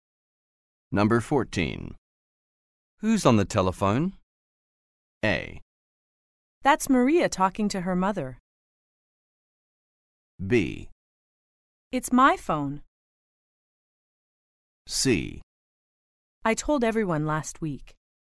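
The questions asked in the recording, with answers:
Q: Who's on the telephone?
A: A: That's Maria talking to her mother.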